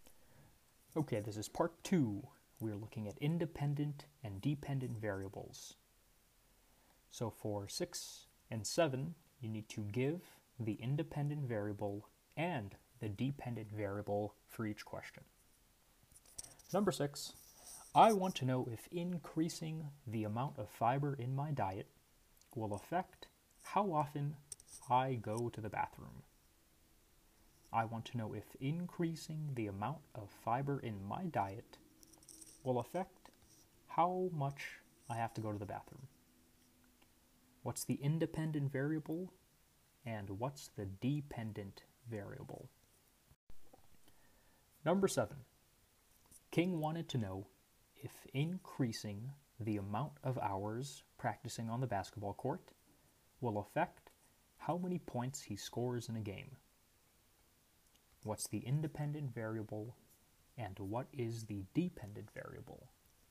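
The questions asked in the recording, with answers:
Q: What's the independent variable and what's the dependent variable?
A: Independent: amount of fiber in the diet; dependent: how often I go to the bathroom

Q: What's the independent variable and what is the dependent variable?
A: Independent: hours practicing on the basketball court; dependent: points scored in a game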